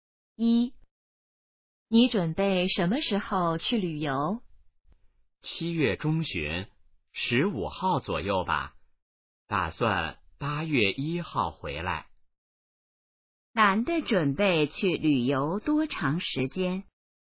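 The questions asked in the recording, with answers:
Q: 男的准备去旅游多长时间?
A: 半个月左右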